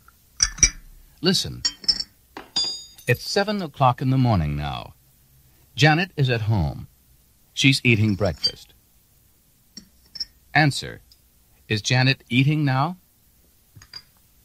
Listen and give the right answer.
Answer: Yes, she is.